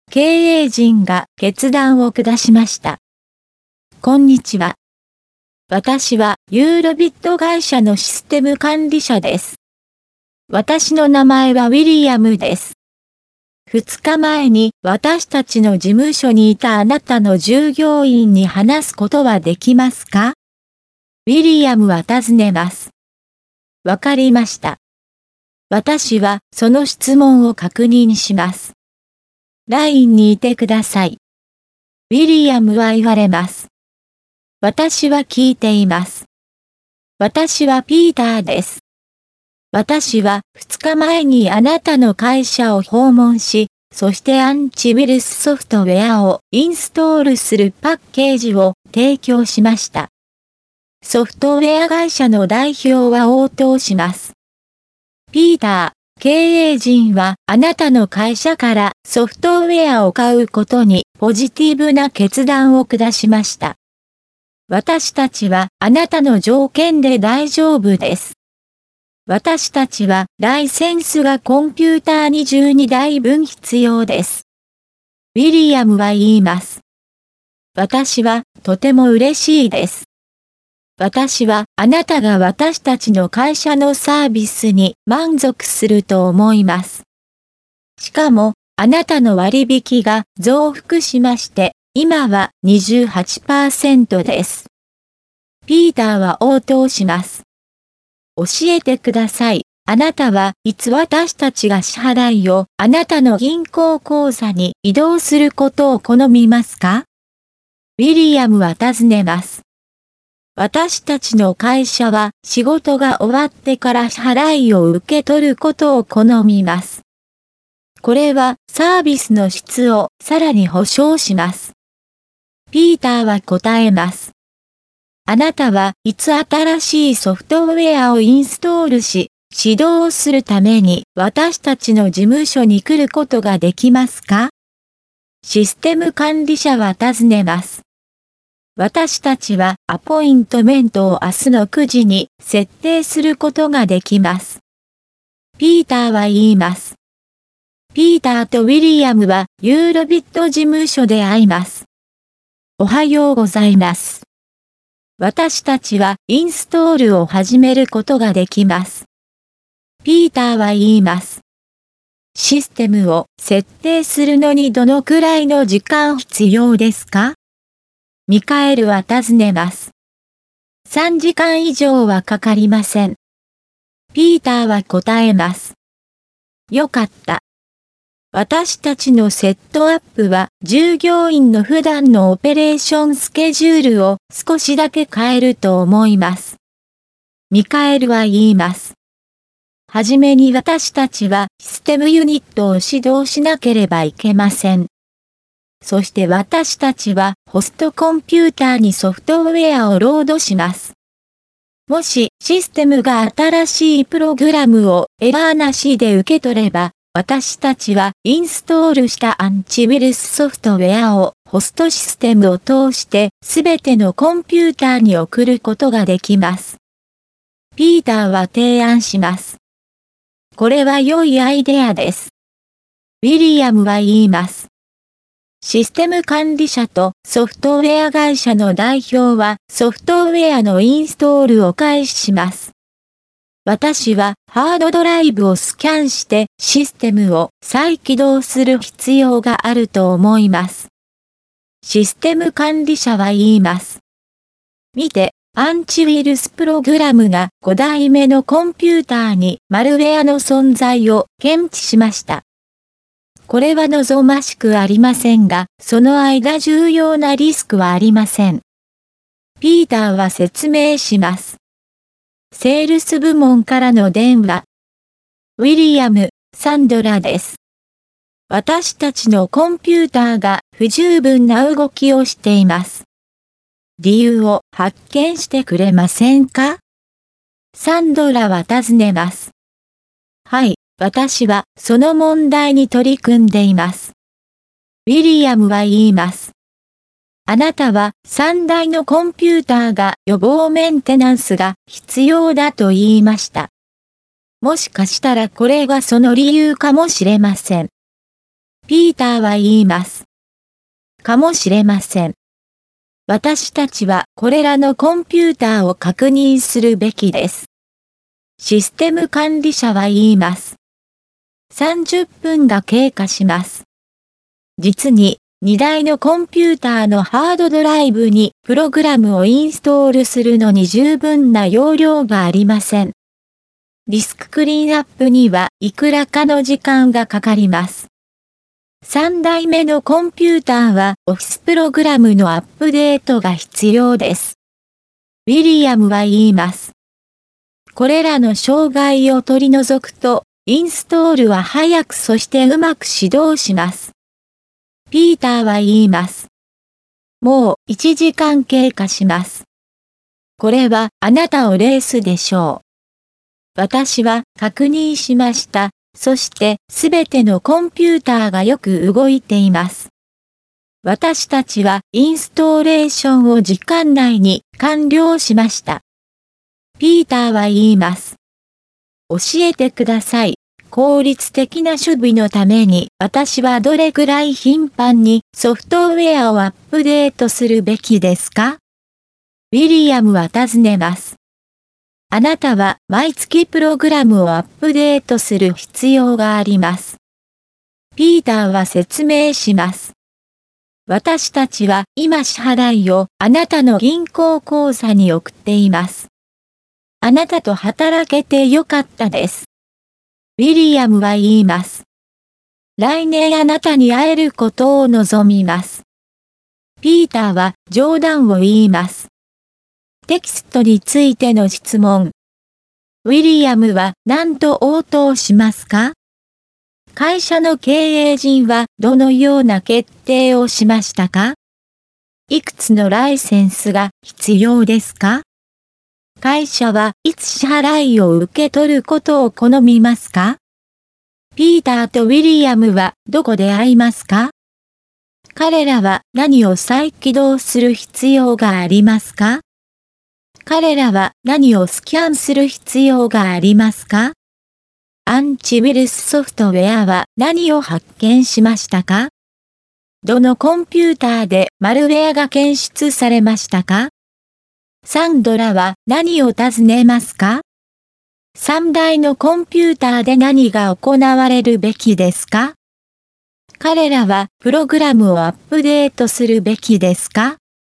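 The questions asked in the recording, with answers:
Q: 会社の経営陣はどのような決定をしましたか?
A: ピーターの会社からソフトウェアを買うというポジティブな決断

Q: いくつのライセンスが必要ですか?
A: コンピューター22台分

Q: 会社はいつ支払いを受け取ることを好みますか?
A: 仕事が終わってから

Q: ピーターとウィリアムはどこで会いますか?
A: ユーロビット事務所

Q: 彼らは何を再起動する必要がありますか?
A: システム

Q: 彼らは何をスキャンする必要がありますか?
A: ハードドライブ

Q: アンチウイルスソフトウェアは何を発見しましたか?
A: マルウェア

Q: どのコンピューターでマルウェアが検出されましたか?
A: 5台目のコンピューター

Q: サンドラは何を尋ねますか?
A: コンピューターの動きが不十分な理由を調べてほしい

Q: 3台のコンピューターで何が行われるべきですか?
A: 予防メンテナンス

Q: 彼らはプログラムをアップデートするべきですか?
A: はい、毎月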